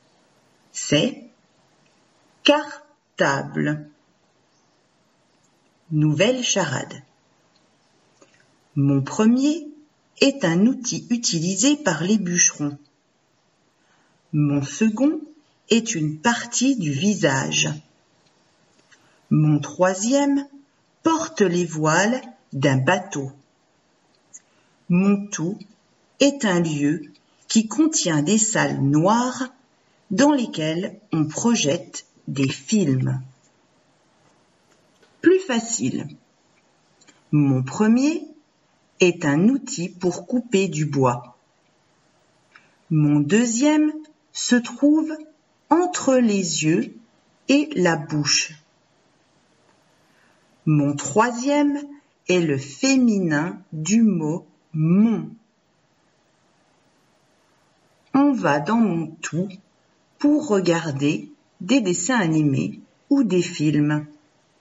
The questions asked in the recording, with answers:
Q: On va dans mon tout pour regarder des dessins animés ou des films.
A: La réponse est « cinéma ».